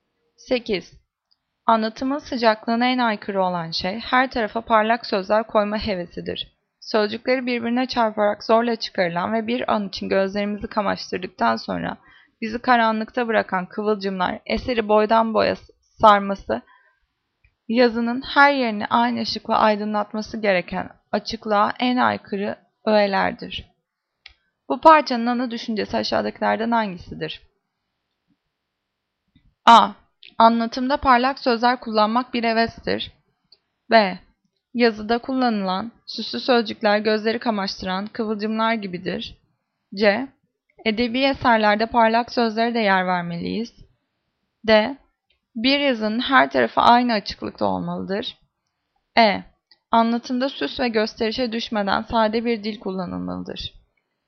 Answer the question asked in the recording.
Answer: Cevap E. Anlatımda süs ve gösterişe düşmeden sade bir dil kullanılmalıdır.